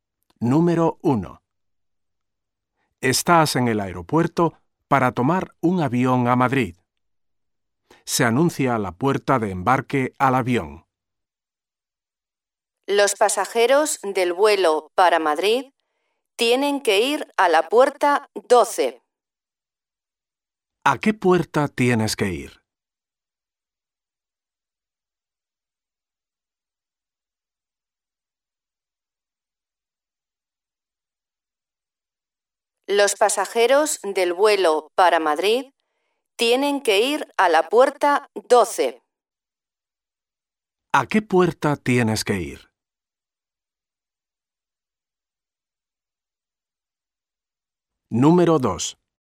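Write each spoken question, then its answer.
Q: ¿A qué puerta tienes que ir?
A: A la puerta 12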